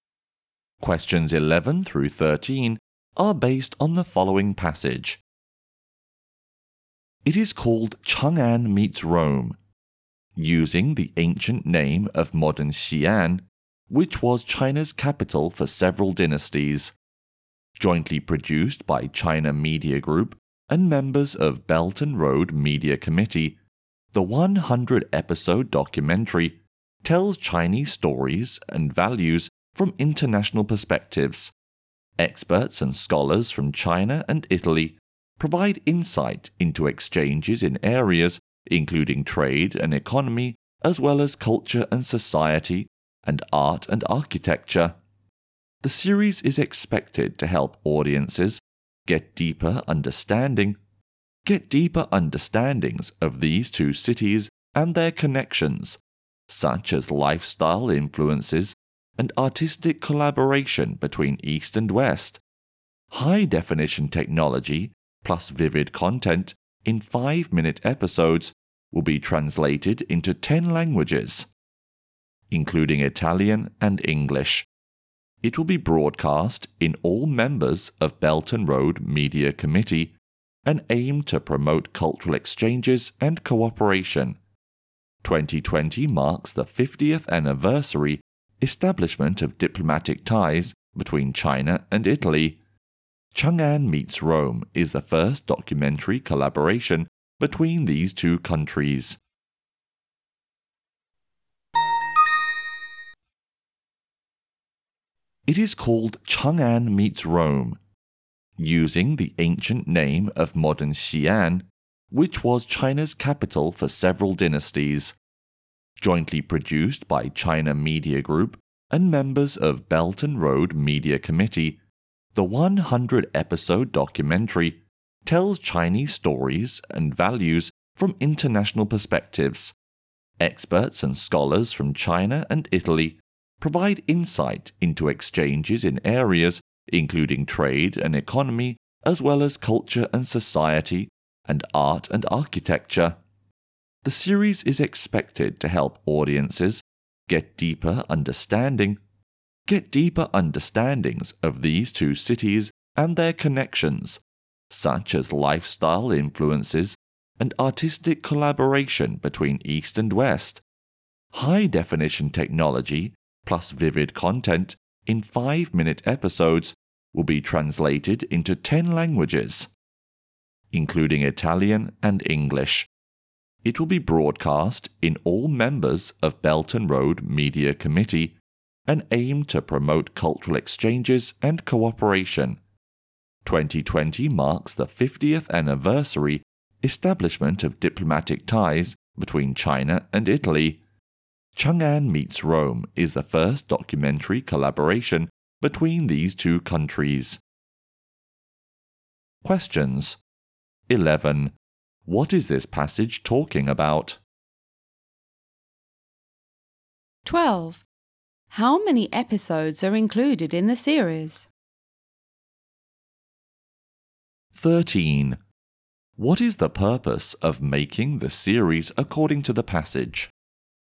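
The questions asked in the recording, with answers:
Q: What is this passage talking about?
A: The China-Italy documentary series Chang'an Meets Rome

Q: How many episodes are included in the series?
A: 100

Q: What is the purpose of making the series according to the passage?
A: To promote cultural exchanges and cooperation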